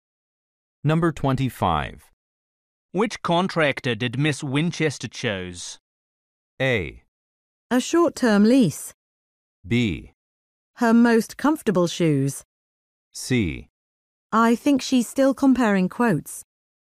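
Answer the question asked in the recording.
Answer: C: I think she's still comparing quotes.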